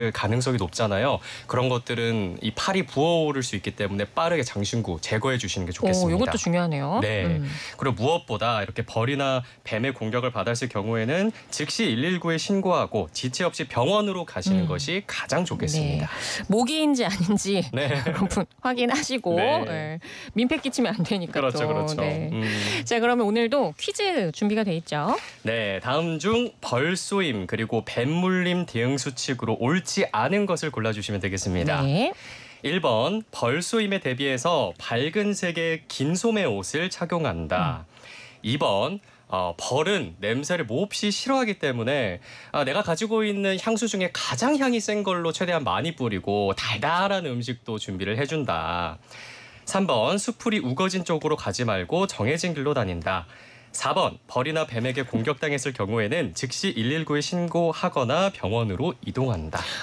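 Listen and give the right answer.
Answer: 2번: 벌은 냄새를 몹시 싫어하기 때문에 내가 가지고 있는 향수 중에 가장 향이 센 걸로 최대한 많이 뿌리고 달달한 음식도 준비를 해준다.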